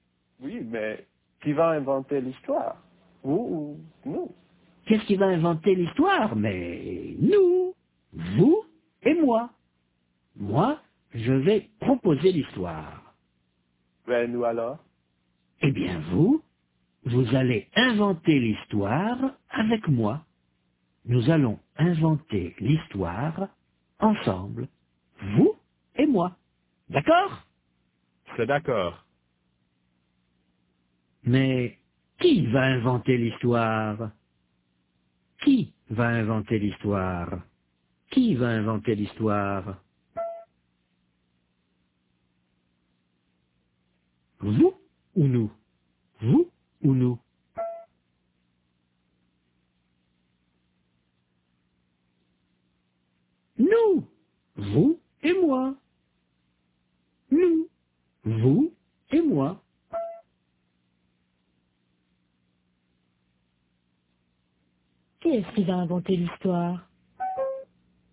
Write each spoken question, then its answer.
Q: Qui est-ce qui va inventer l'histoire?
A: Nous.